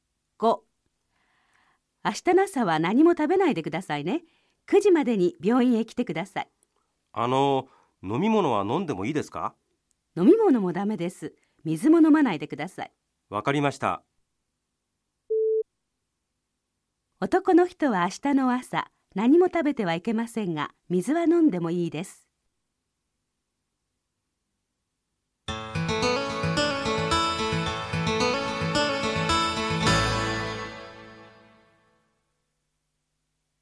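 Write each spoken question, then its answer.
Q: 男の人は明日の朝、何も食べてはいけませんが、水は飲んでもいいです。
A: ×(水も飲んではいけない)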